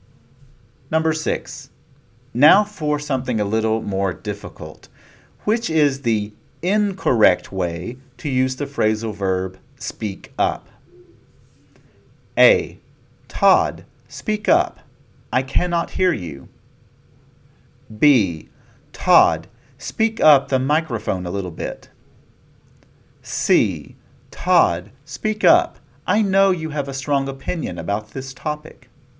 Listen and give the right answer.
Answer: B is incorrect.